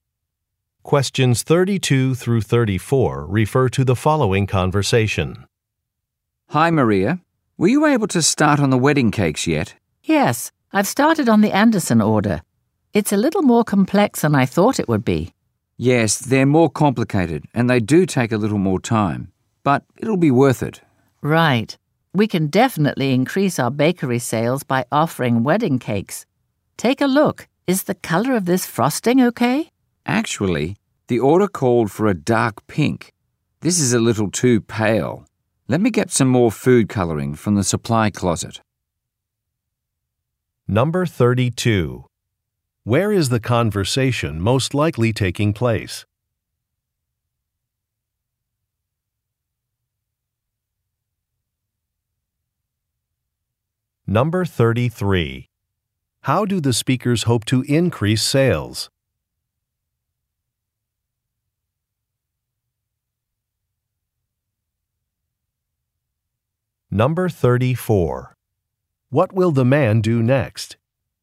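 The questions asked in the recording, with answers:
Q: Where is the conversation most likely taking place?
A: At a bakery

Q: How do the speakers hope to increase sales?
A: By offering wedding cakes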